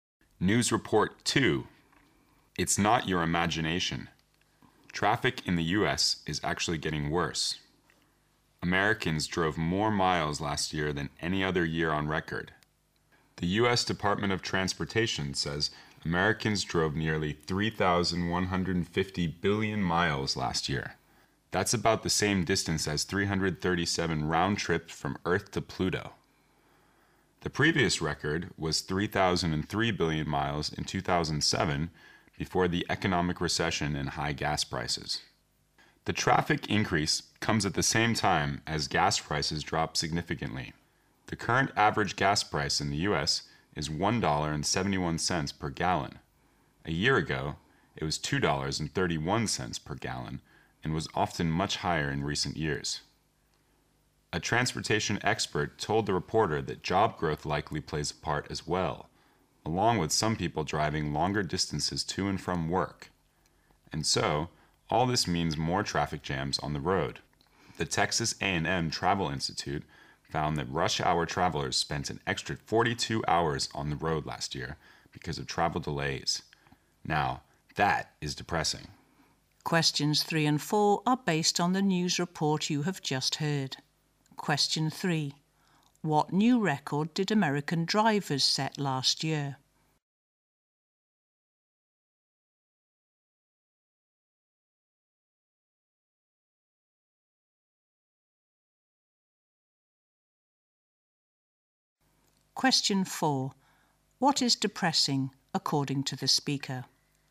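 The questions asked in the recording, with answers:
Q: What new record did American drivers set last year?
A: They drove more miles than in any other year (nearly 3,150 billion miles)

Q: What is depressing, according to the speaker?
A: Rush hour travelers spent an extra 42 hours on the road because of delays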